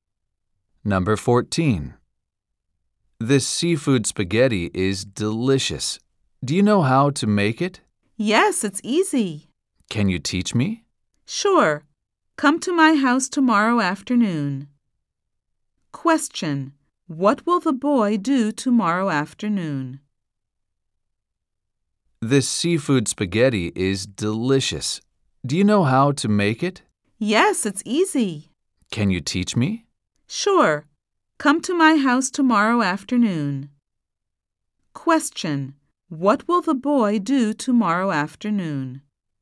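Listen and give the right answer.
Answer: Go to the girl's house to learn how to make seafood spaghetti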